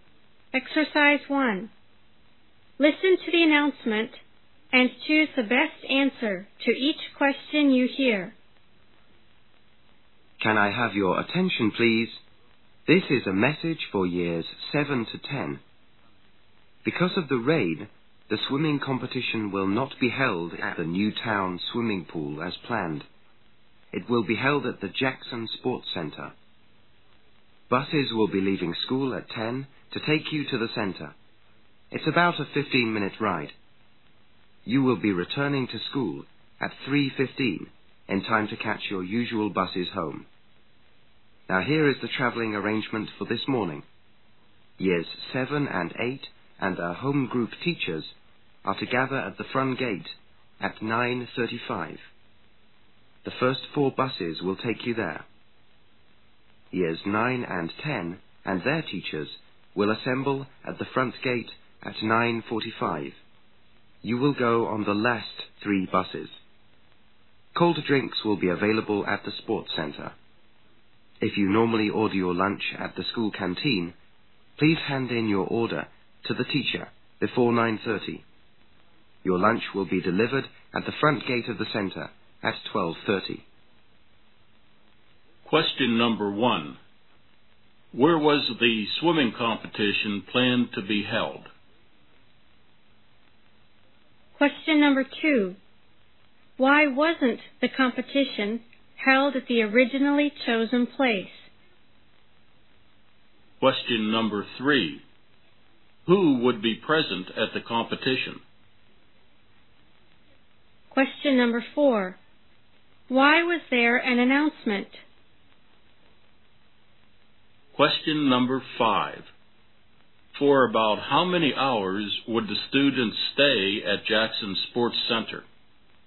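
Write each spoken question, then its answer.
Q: Where was the swimming competition planned to be held?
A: At the Newtown swimming pool

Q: Why wasn't the competition held at the originally chosen place?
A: Because of the rain

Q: Who would be present at the competition?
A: Years 7 to 10 and their teachers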